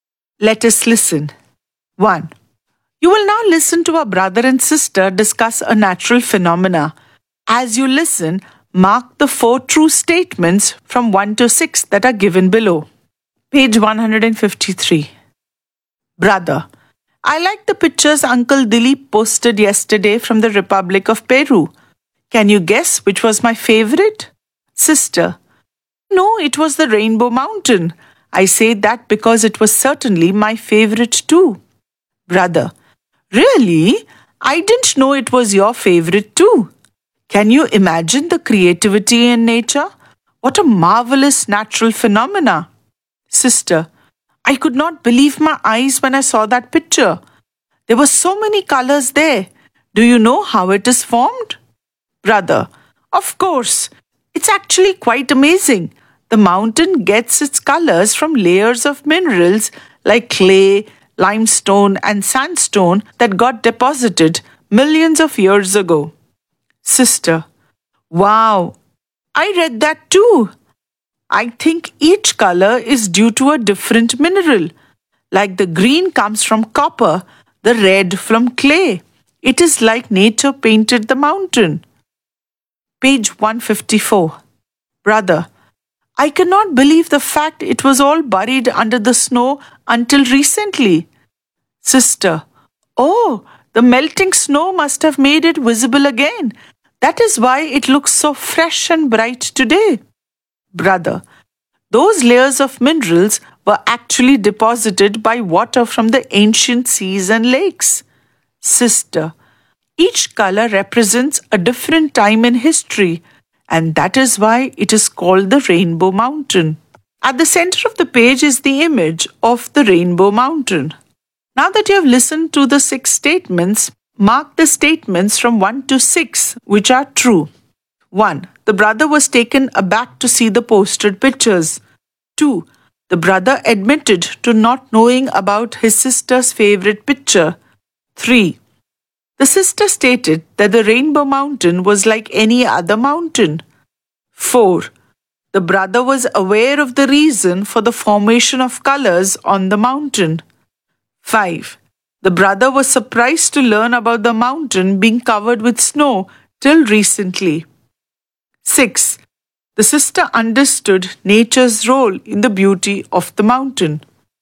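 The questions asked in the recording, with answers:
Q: The brother admitted to not knowing about his sister's favorite picture.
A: True

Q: The sister stated that the Rainbow Mountain was like any other mountain.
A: False

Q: The brother was aware of the reason for the formation of colors on the mountain.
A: True

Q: The brother was surprised to learn about the mountain being covered with snow till recently.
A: True

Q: The sister understood nature's role in the beauty of the mountain.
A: True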